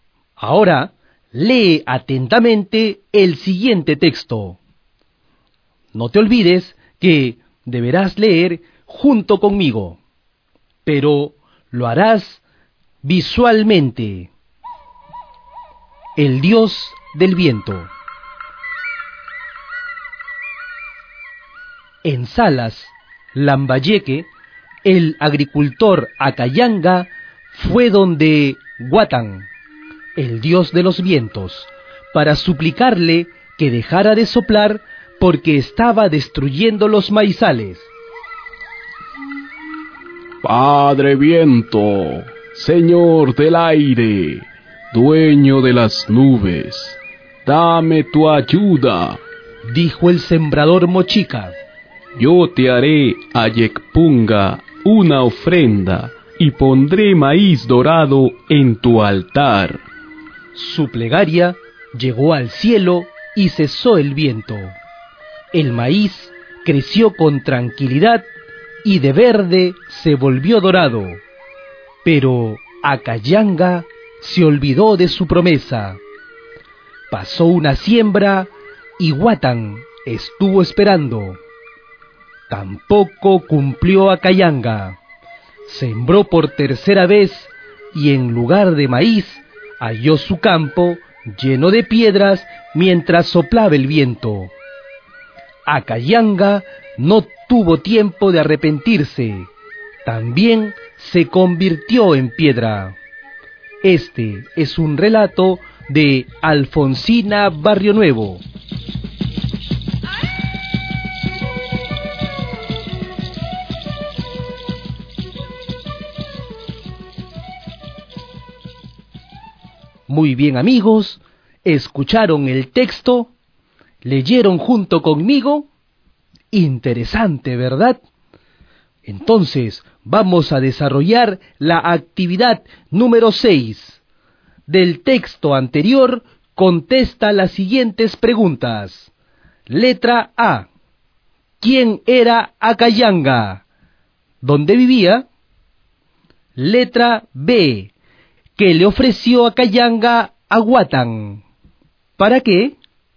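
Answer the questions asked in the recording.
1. Un agricultor (sembrador) mochica
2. En Salas, Lambayeque
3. Una ofrenda: maíz dorado en su altar
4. Para que dejara de soplar el viento, que destruía sus maizales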